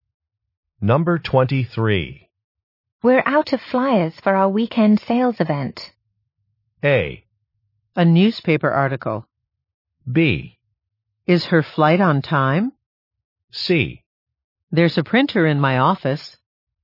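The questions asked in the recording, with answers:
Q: We're out of flyers for our weekend sales event.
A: C: There's a printer in my office.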